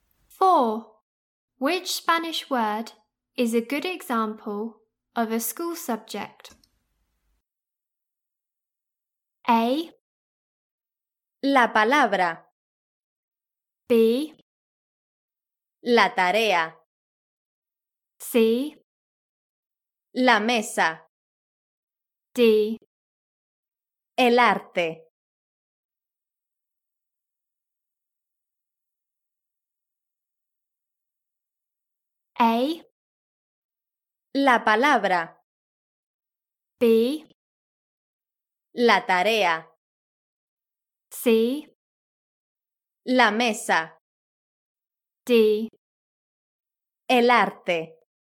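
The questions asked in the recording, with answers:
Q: Which Spanish word is a good example of a school subject?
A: D: El arte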